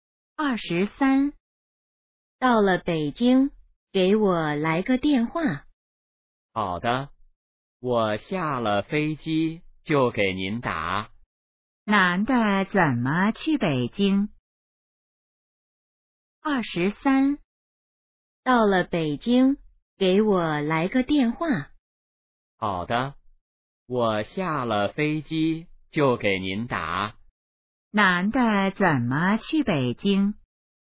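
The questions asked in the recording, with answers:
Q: 男的怎么去北京?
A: 坐飞机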